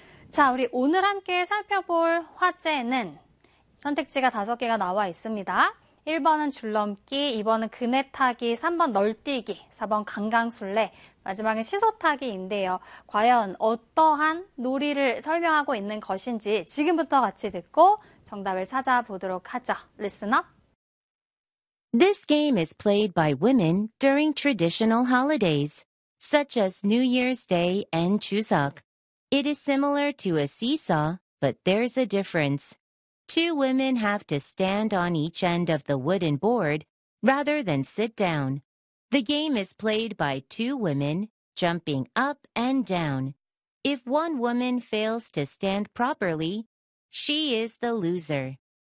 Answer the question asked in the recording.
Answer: 정답은 5번의 시소타기가 아니라 3번의 널뛰기로 골라주면 되겠습니다.